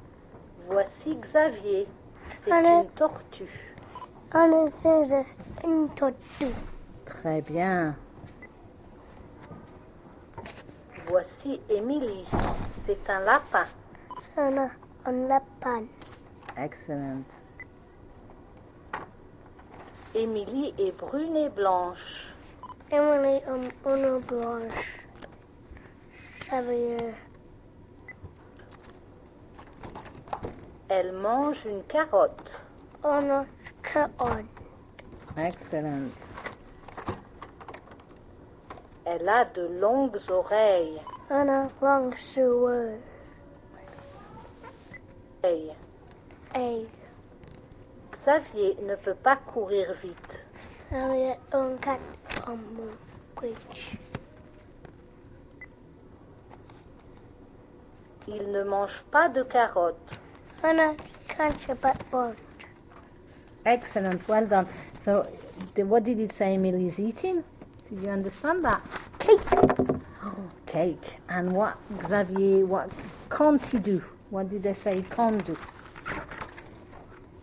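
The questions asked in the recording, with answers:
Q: So, what did it say Emily's eating?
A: A carrot

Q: What did they say he can't do?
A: Run fast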